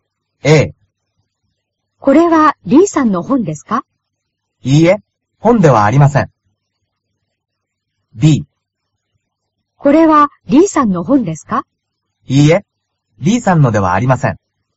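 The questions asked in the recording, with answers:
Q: これは D さんの本ですか?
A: B: いいえ、D さんのではありません。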